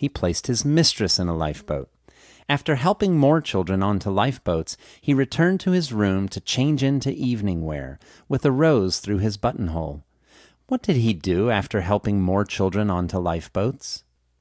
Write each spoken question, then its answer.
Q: What did he do after helping more children onto lifeboats?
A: He returned to his room to change into evening wear after helping more children onto lifeboats.